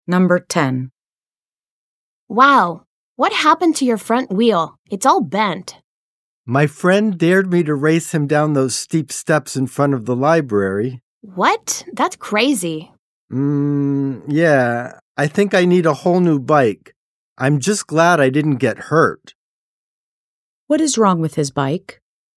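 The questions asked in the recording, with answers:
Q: What is wrong with his bike?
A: The front wheel is bent.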